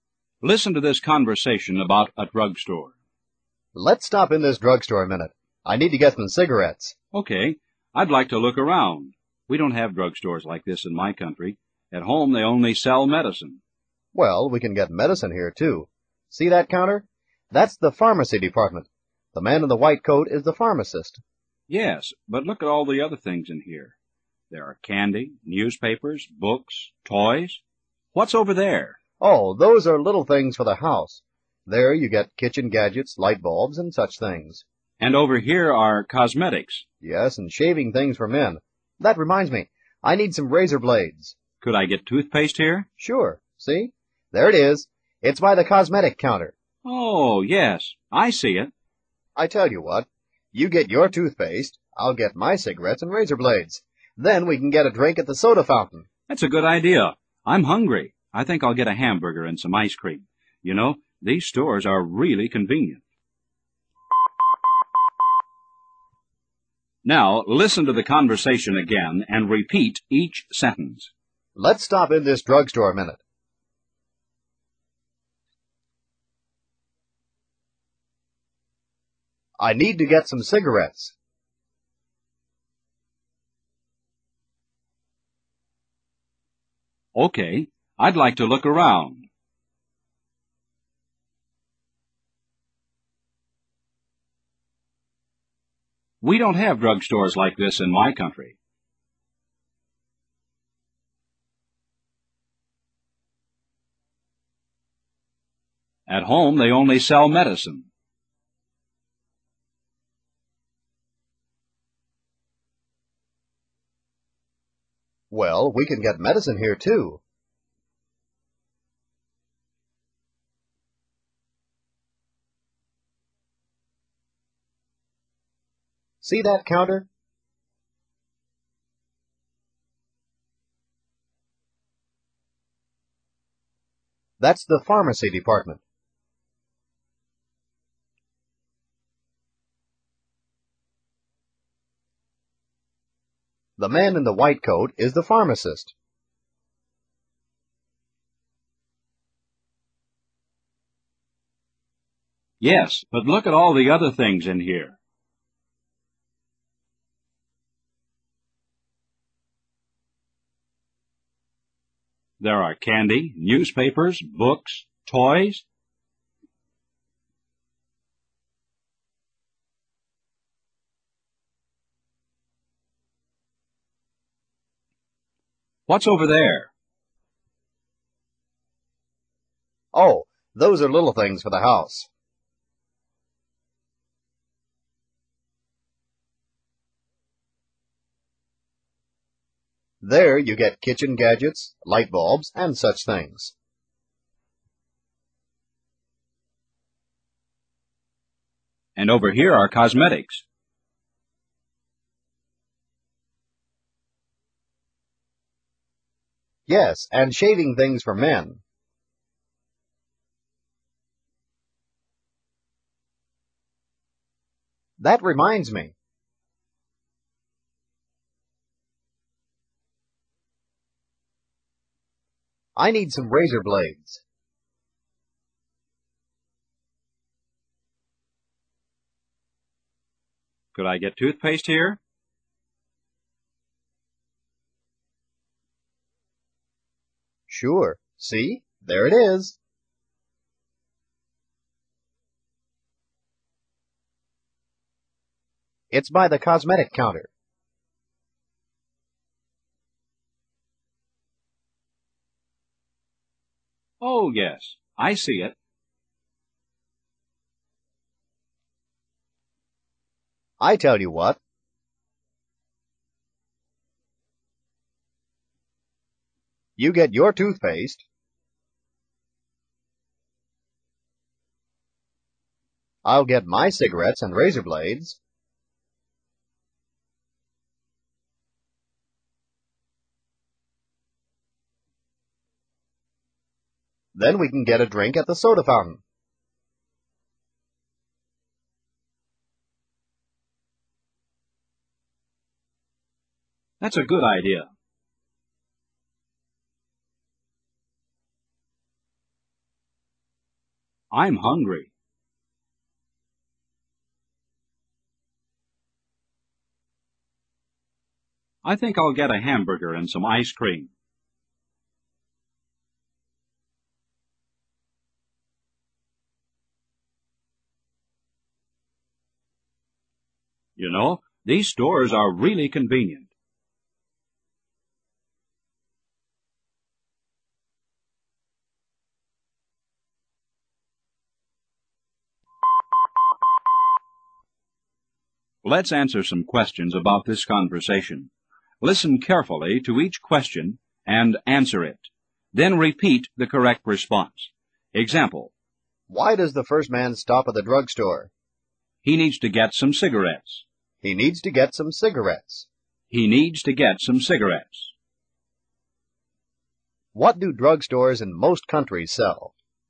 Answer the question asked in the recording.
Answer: They sell medicine.